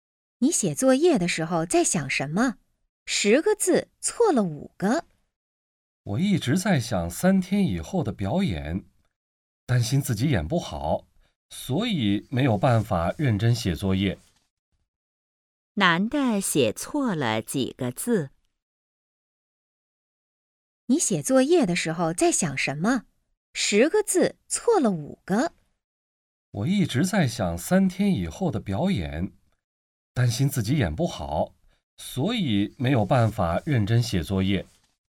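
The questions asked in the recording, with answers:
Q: 男的写错了几个字?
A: 5个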